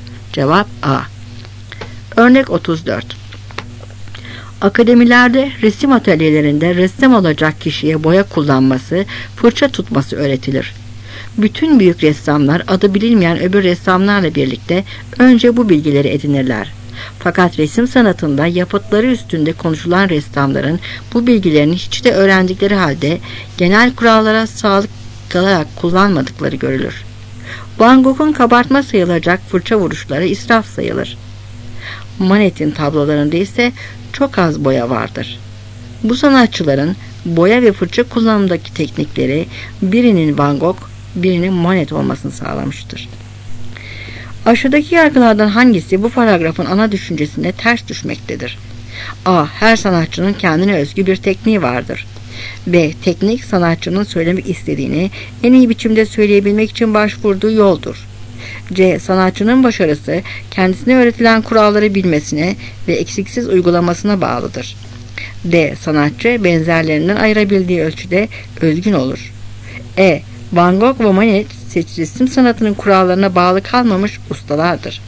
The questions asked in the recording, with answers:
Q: Aşağıdaki yargılardan hangisi bu paragrafın ana düşüncesine ters düşmektedir?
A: Cevap C.